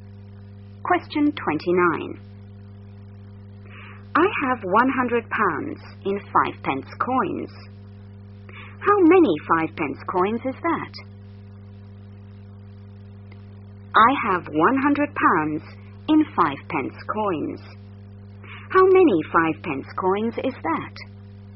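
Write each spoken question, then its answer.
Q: How many 5 pence coins is that?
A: 2000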